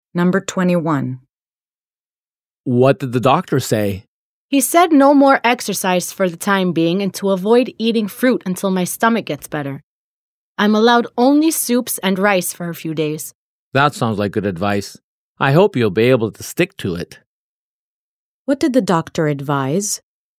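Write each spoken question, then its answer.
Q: What did the doctor advise?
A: No exercise for now, no fruit, and only soups and rice for a few days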